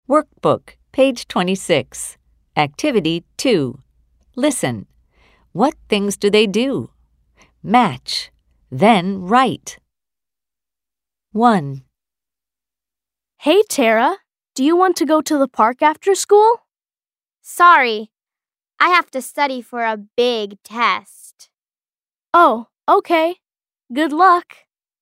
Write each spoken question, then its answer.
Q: What things do they do?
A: Tara studies for a test.